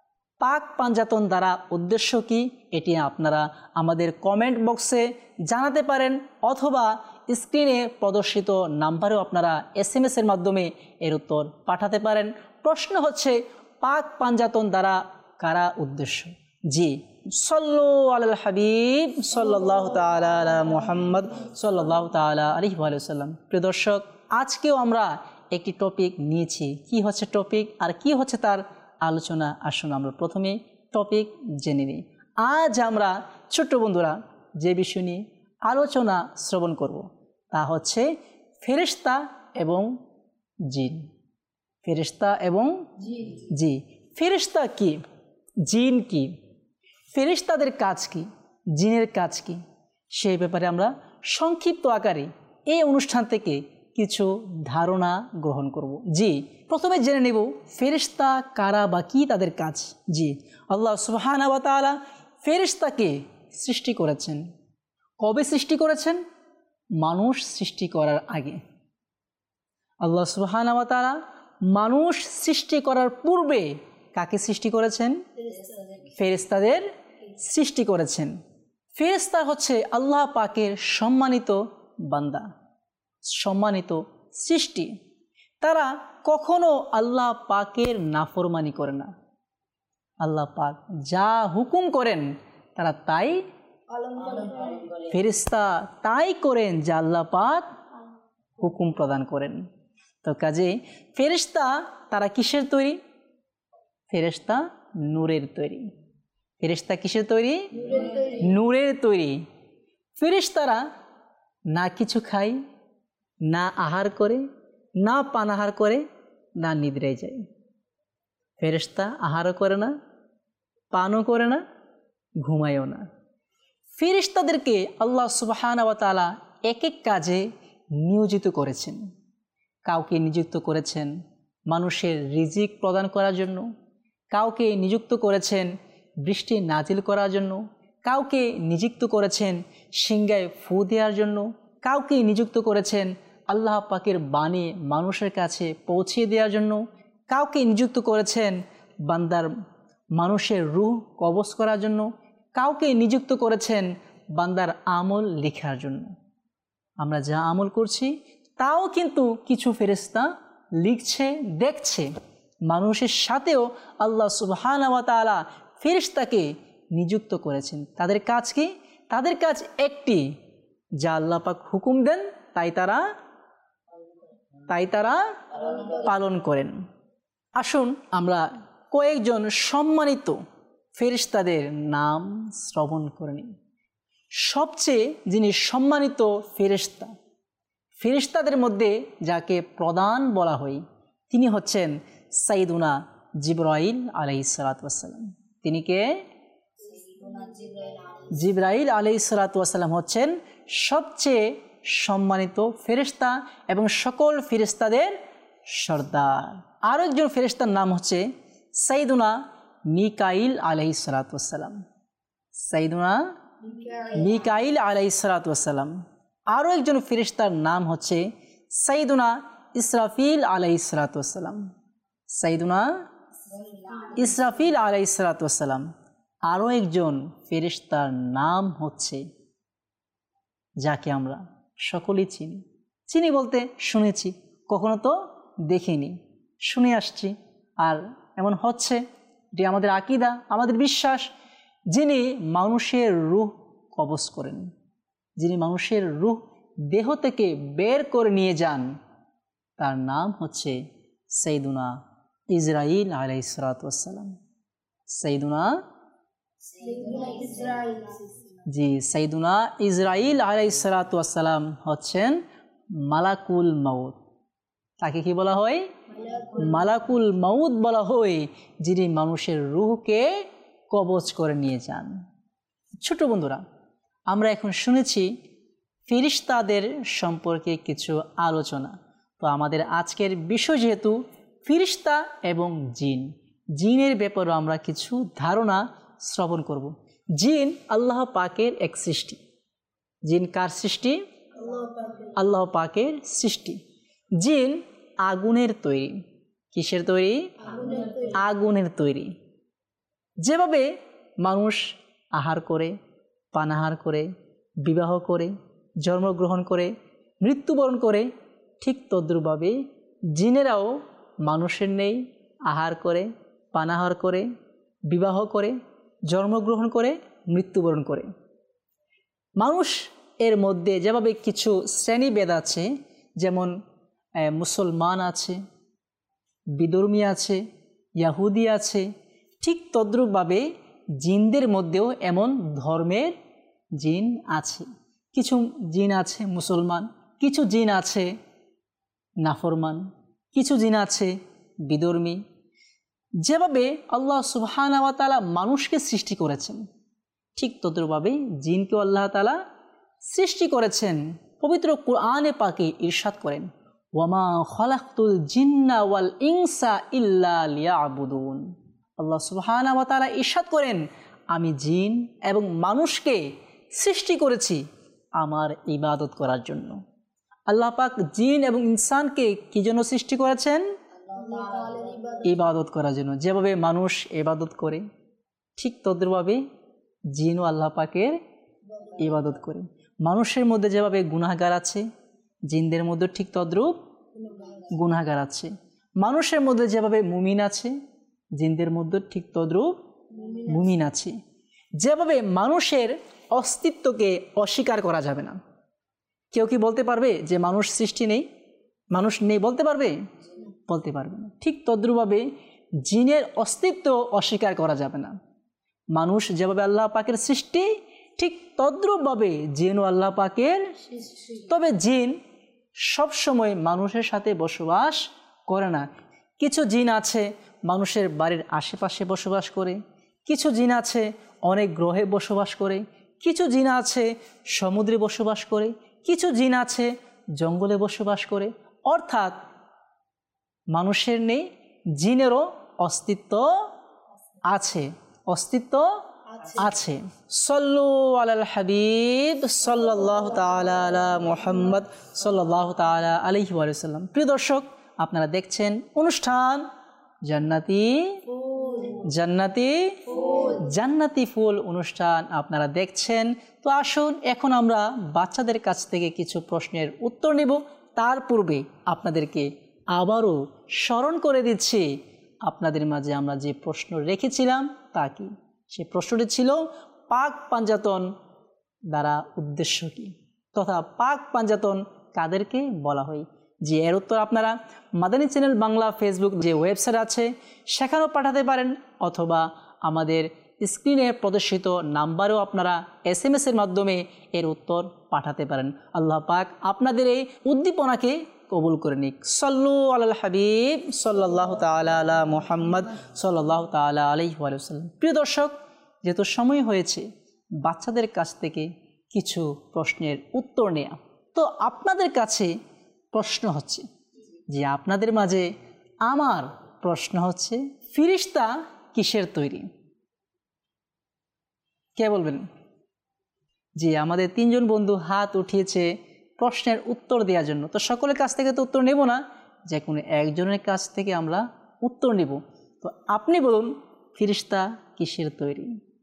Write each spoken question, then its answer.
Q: ফেরিশতা কিসের তৈরি?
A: ফেরিশতা নূরের তৈরি।